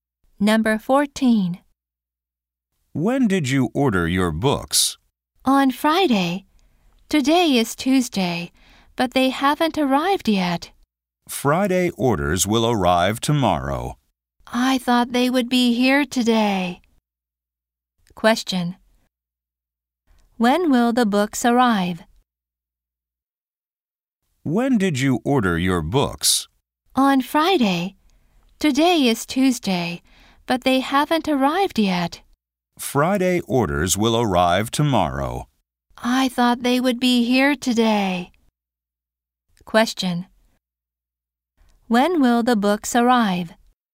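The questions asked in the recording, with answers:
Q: When will the books arrive?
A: Tomorrow (Wednesday)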